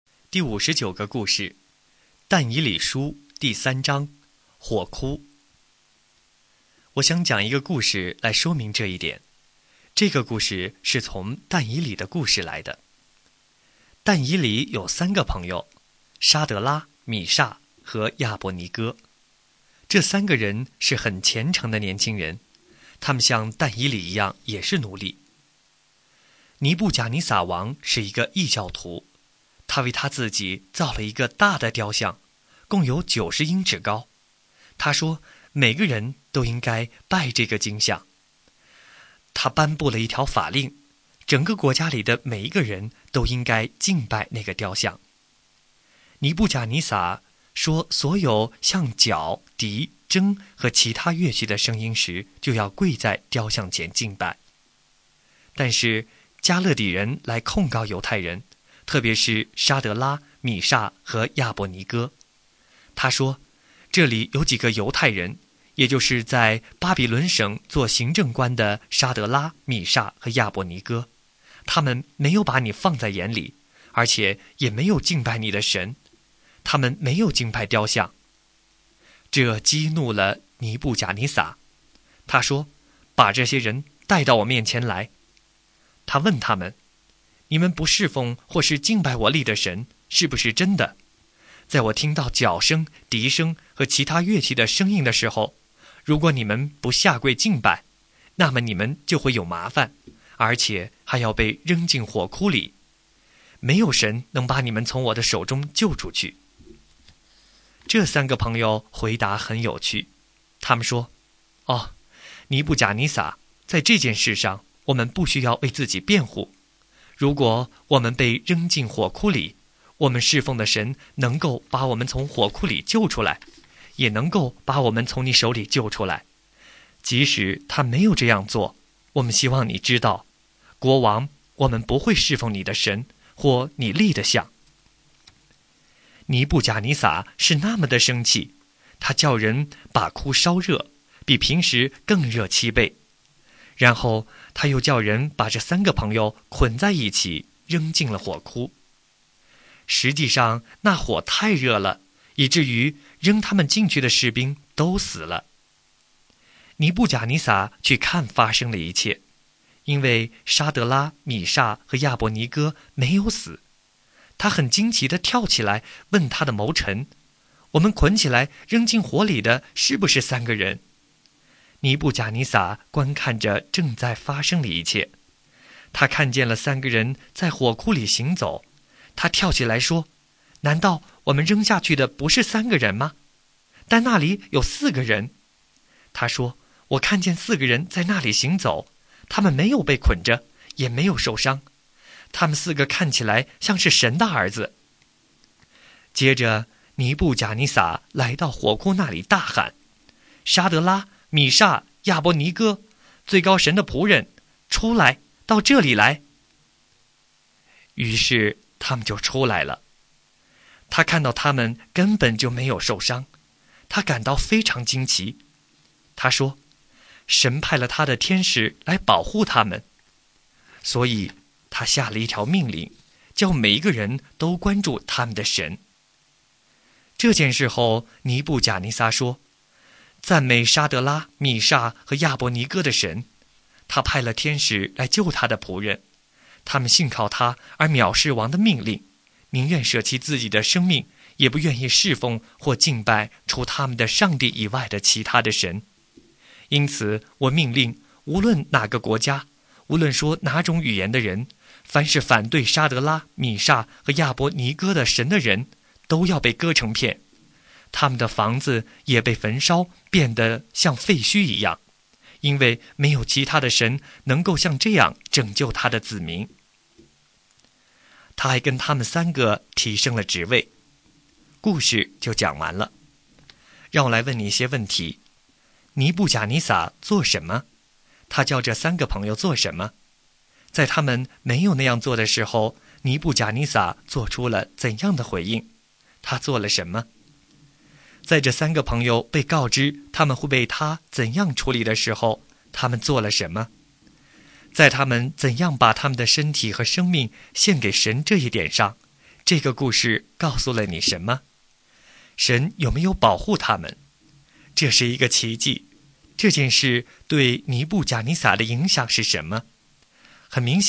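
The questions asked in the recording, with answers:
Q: 尼布甲尼撒做什么?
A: 他造了一个90英尺高的金像,并下令每个人都要敬拜它

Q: 他叫这三个朋友做什么?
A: 跪拜敬拜他立的金像

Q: 在他们没有那样做的时候,尼布甲尼撒做出了怎样的回应?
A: 他很生气,把火窟烧得比平时热七倍,把他们捆起来扔进火窟

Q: 在这三个朋友被告知他们会被他怎样处理的时候,他们做了什么?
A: 他们说神能救他们,即使神不救,他们也不会侍奉王的神或敬拜金像

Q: 神有没有保护他们?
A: 有,神派天使保护他们,他们没有受伤

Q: 这件事对尼布贾尼撒的影响是什么?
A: 很明显,他一定意识到了神的力量,他一定知道了神是真的,他是全能的。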